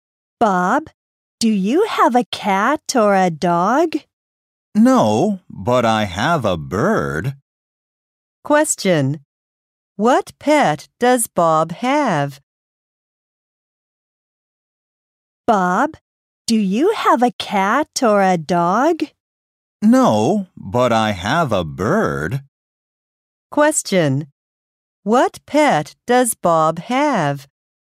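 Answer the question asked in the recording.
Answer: A bird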